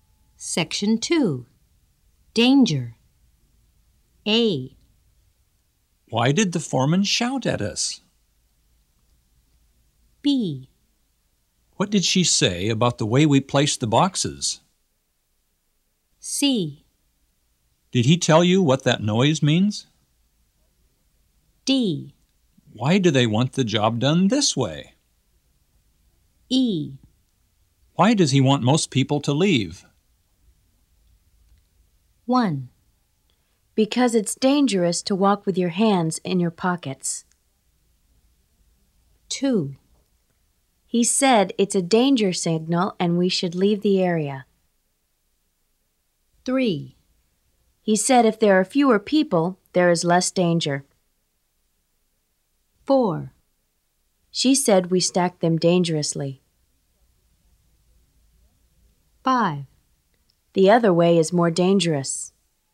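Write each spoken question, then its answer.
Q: Why did the foreman shout at us?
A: 1: Because it's dangerous to walk with your hands in your pockets.

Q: What did she say about the way we placed the boxes?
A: 4: She said we stacked them dangerously.

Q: Did he tell you what that noise means?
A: 2: He said it's a danger signal and we should leave the area.

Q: Why do they want the job done this way?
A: 5: The other way is more dangerous.

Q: Why does he want most people to leave?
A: 3: He said if there are fewer people, there is less danger.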